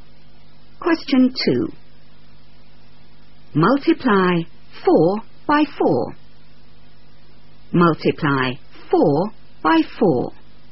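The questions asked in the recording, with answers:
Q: Multiply 4 by 4.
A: 16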